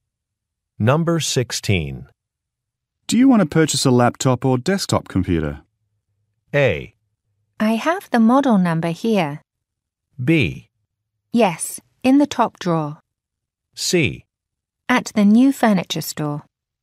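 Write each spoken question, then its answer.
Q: Do you want to purchase a laptop or desktop computer?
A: A: I have the model number here.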